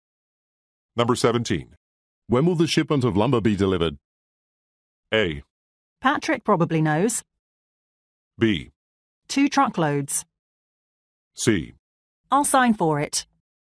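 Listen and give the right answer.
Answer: A: Patrick probably knows.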